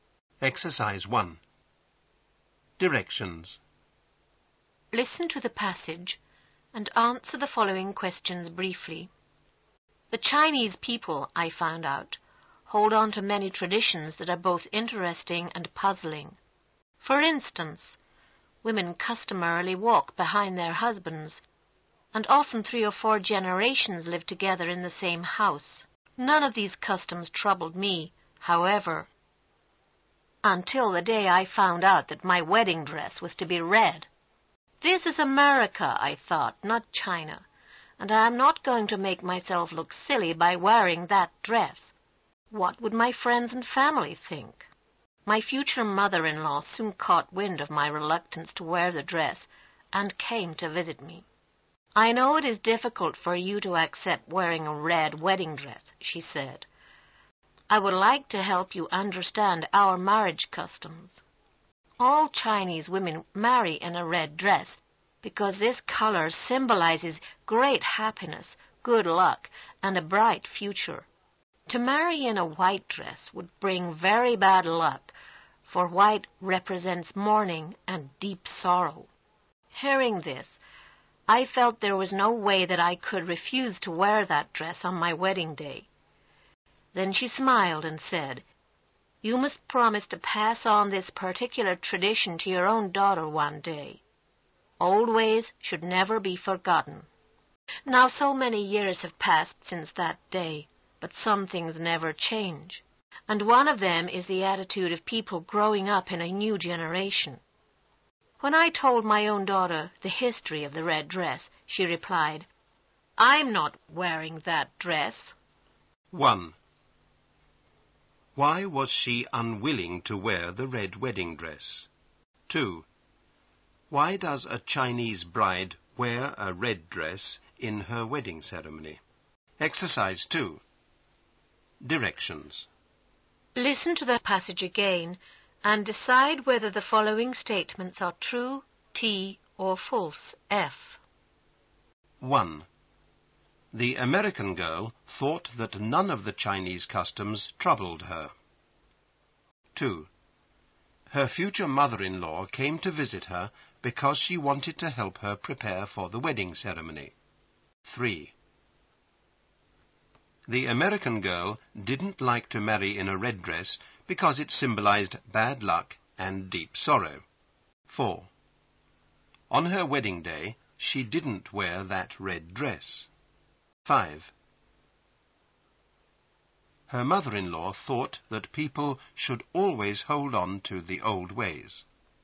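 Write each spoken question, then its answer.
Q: Why was she unwilling to wear the red wedding dress?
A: She thought it would make her look silly to her friends and family

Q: Why does a Chinese bride wear a red dress in her wedding ceremony?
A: Red symbolizes great happiness, good luck and a bright future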